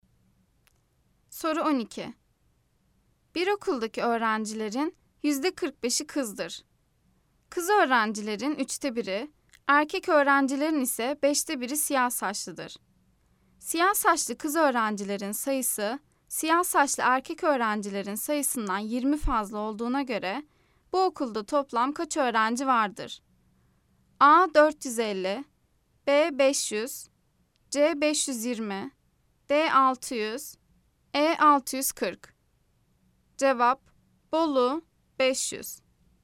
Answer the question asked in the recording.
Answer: Cevap, Bolu 500.